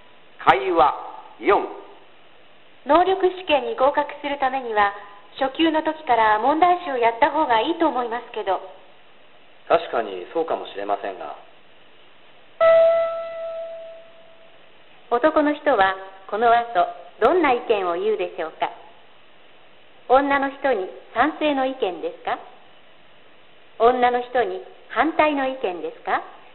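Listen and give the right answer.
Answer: 女の人に反対の意見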